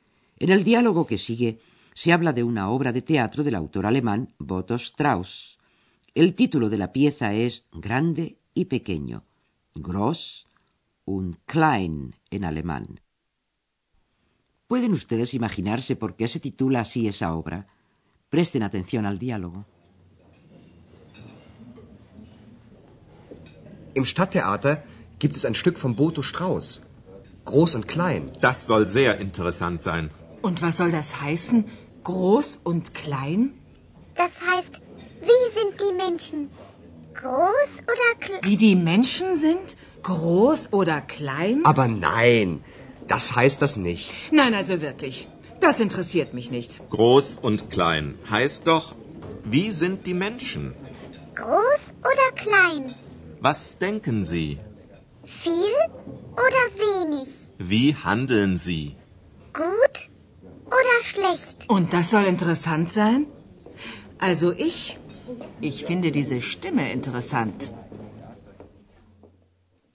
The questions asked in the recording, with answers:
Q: ¿Pueden ustedes imaginarse por qué se titula así esa obra?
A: Grande y pequeño es una referencia al carácter de las personas, cómo son los seres humanos, cómo piensan, cómo actúan.